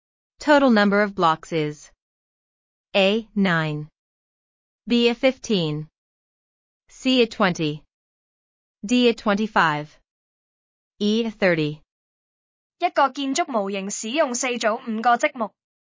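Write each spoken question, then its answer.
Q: Total number of blocks is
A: C: 20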